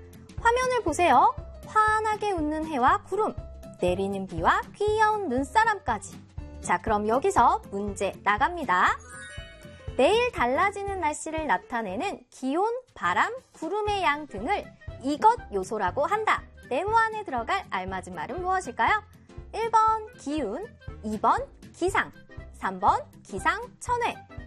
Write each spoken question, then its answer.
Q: 네모 안에 들어갈 알맞은 말은 무엇일까요?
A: 정답은 2번이죠?